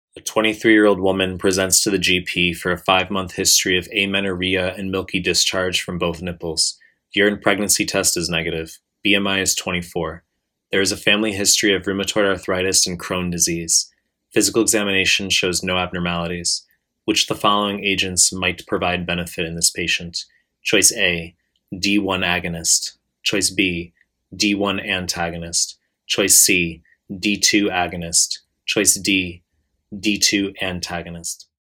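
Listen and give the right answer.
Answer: C: D2 agonist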